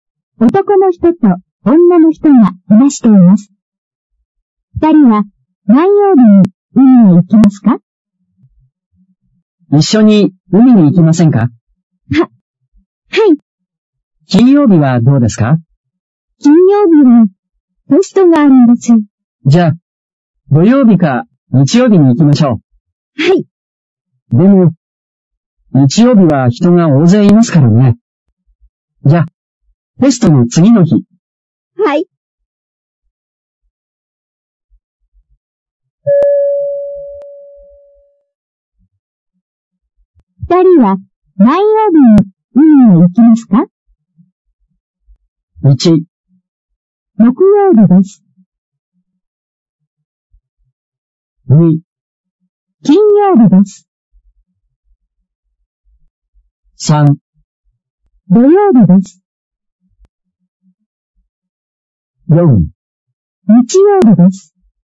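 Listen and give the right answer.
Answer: 3: 土曜日です。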